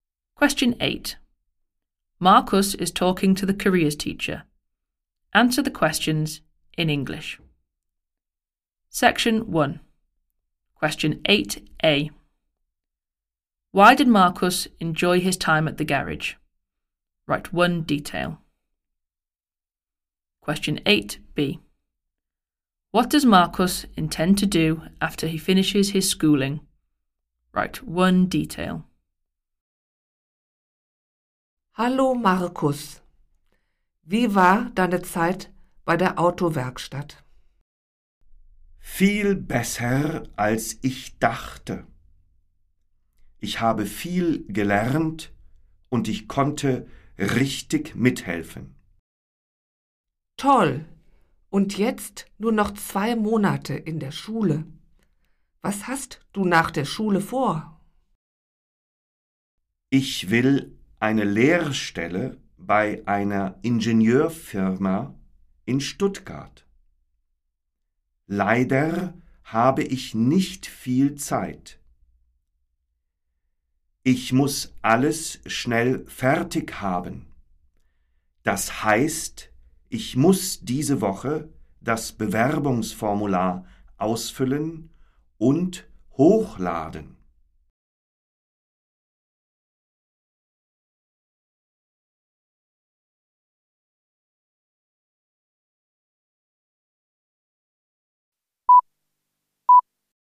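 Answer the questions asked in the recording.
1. He learned a lot and could really help
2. An apprenticeship at an engineering firm in Stuttgart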